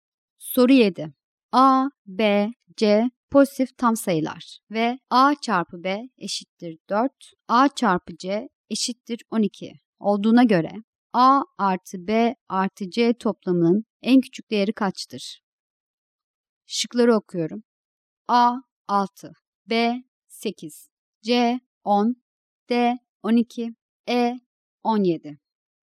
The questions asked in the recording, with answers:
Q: A, B, C pozitif tam sayılar ve A çarpı B eşittir 4, A çarpı C eşittir 12 olduğuna göre A artı B artı C toplamının en küçük değeri kaçtır?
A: Doğru cevap B şıkkı.